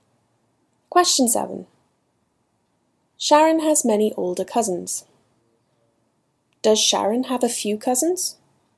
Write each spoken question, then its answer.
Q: Does Sharon have a few cousins?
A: No. Sharon has many older cousins.